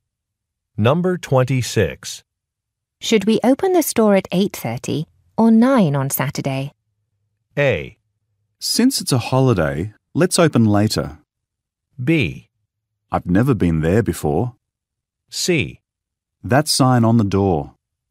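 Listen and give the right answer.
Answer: A: Since it's a holiday, let's open later.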